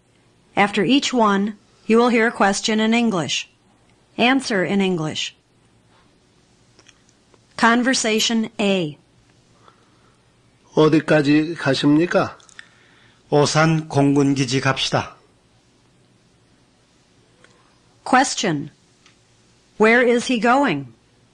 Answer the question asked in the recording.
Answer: He's going to Osan Air Force Base.